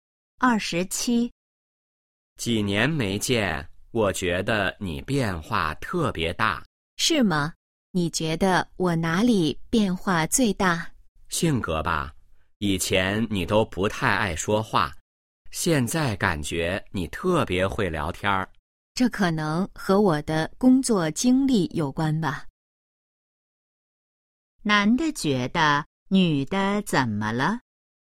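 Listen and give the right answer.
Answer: 性格变化很大,变得特别会聊天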